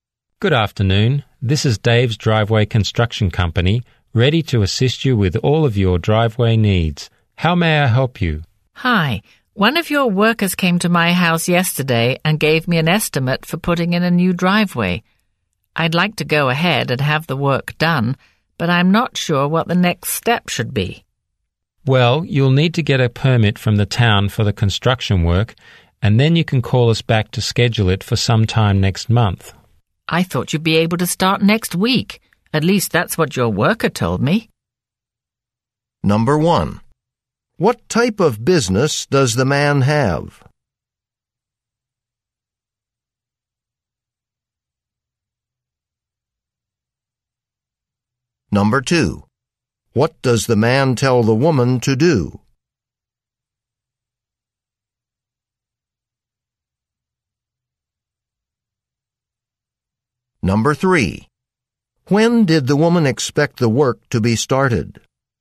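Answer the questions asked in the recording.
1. Driveway construction
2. Get a permit from the town
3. Next week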